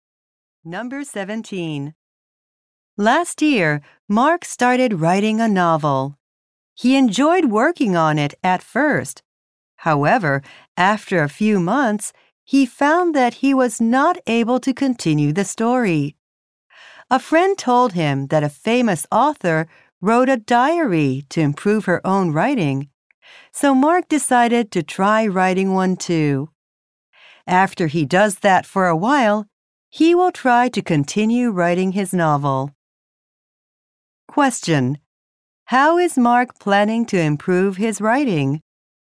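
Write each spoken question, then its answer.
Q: How is Mark planning to improve his writing?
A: By writing a diary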